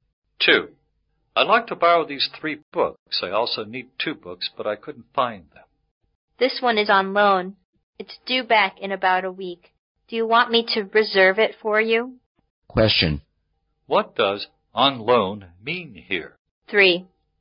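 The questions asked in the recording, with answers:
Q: What does on loan mean here?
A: Someone else has borrowed it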